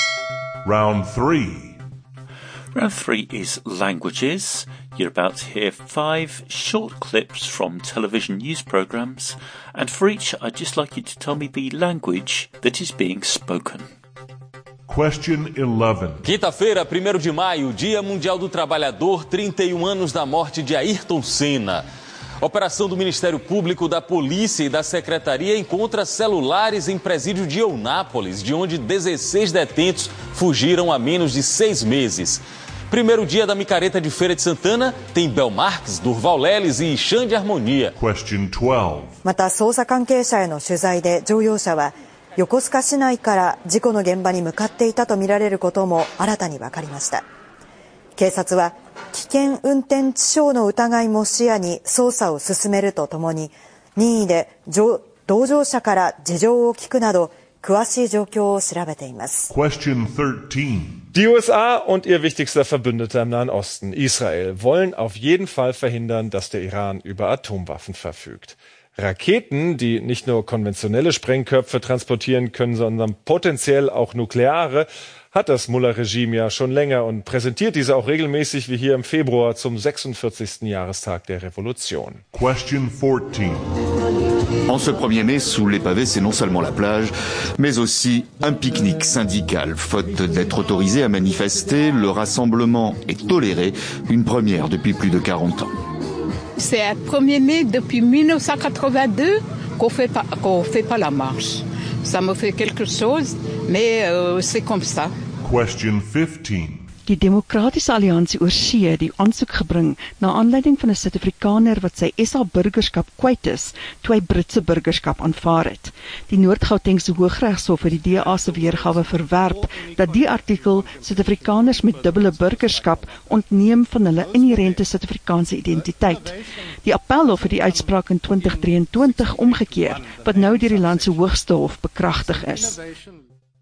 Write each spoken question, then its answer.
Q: Question 11.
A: Round 3 was languages, and the answer to number 11 was Portuguese.

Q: Question 12.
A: Number 12 was Japanese.

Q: Question 13.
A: Number 13 was German.

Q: Question 14.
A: Number 14 was French.

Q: Question 15.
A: And number 15 was Afrikaans.